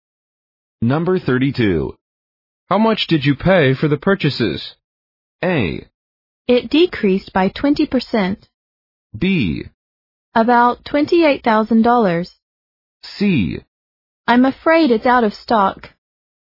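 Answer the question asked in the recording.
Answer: B: About $28,000.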